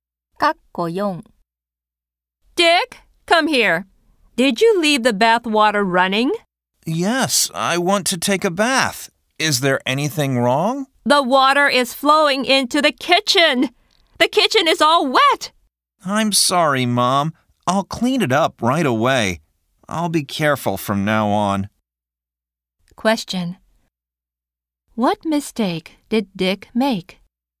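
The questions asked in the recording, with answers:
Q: What mistake did Dick make?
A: He left the bath water running and the kitchen got wet.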